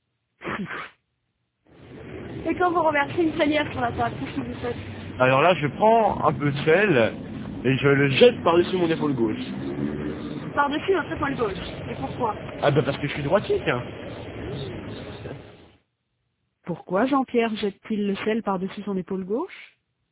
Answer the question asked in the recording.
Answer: Parce qu'il est droitier.